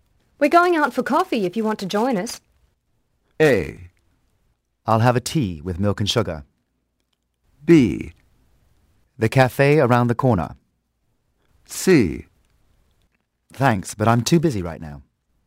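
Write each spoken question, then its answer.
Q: We're going out for coffee if you want to join us.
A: C: Thanks, but I'm too busy right now.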